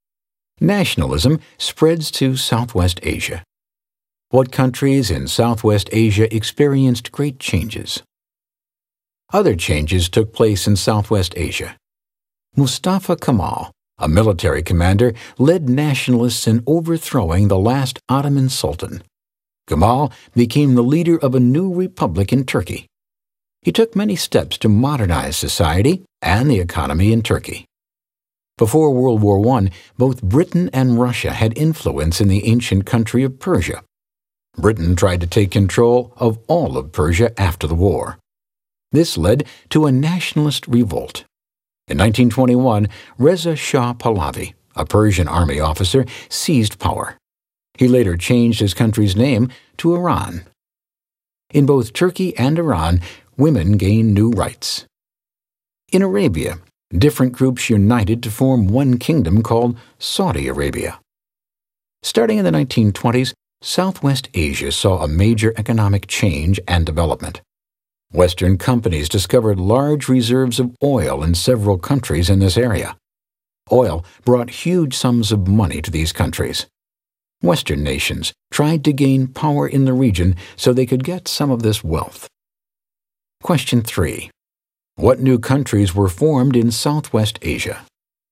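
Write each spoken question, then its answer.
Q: What new countries were formed in Southwest Asia?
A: Turkey, Iran and Saudi Arabia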